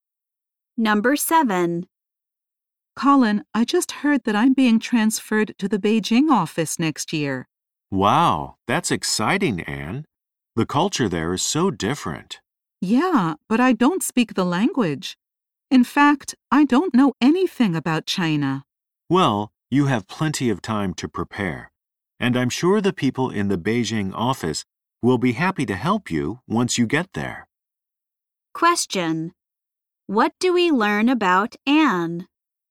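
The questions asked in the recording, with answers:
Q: What do we learn about Anne?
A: She is being transferred to the Beijing office next year.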